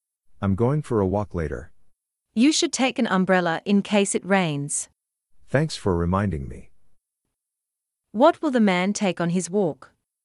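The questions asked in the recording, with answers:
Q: What will the man take on his walk?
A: An umbrella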